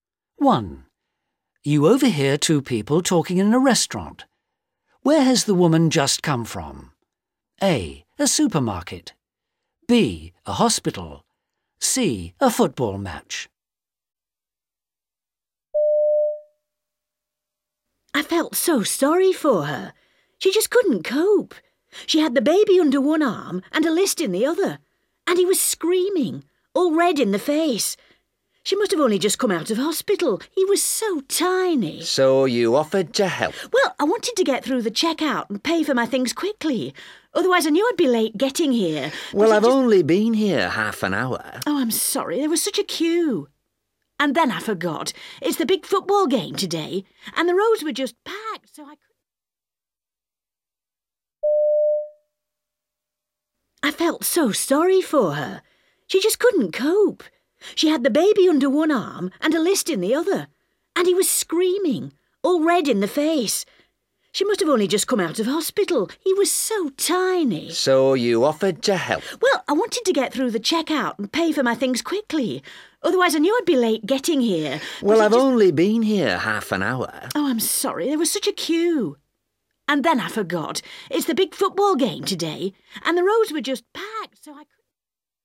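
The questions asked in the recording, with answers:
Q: Where has the woman just come from?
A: A: A supermarket.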